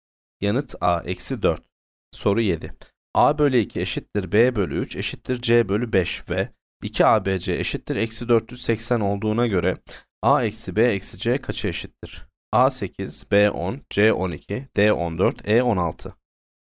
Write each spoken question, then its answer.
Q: A bölü 2 eşittir b bölü 3 eşittir c bölü 5 ve 2abc eşittir eksi 480 olduğuna göre a eksi b eksi c kaça eşittir?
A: Yanıt c 12.